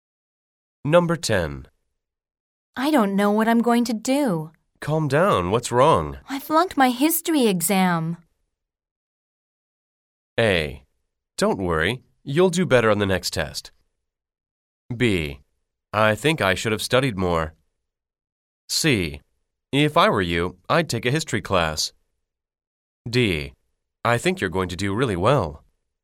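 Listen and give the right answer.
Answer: A: Don't worry. You'll do better on the next test.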